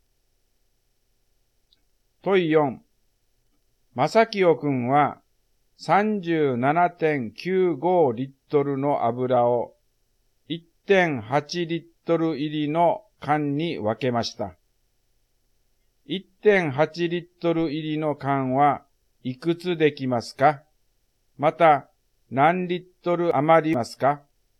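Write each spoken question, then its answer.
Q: 1.8 リットル入りの缶はいくつできますか?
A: 21缶

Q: また何リットル余りますか?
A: 0.15リットル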